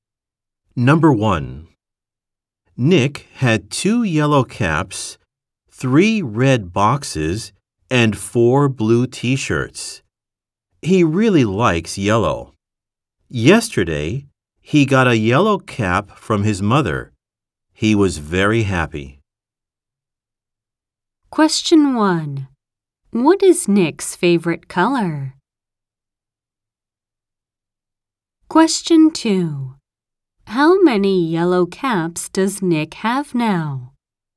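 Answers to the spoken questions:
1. Yellow
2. Three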